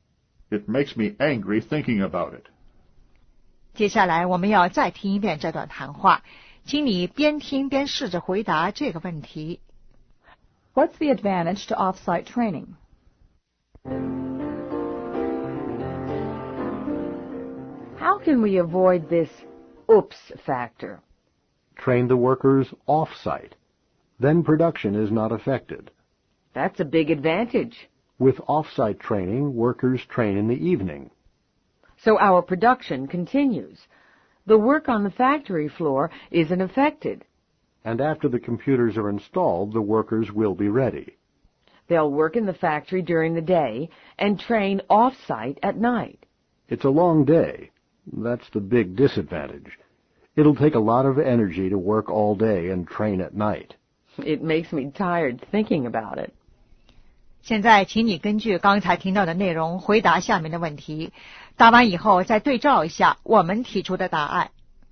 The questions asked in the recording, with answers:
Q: What's the advantage to off-site training?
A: Production is not affected.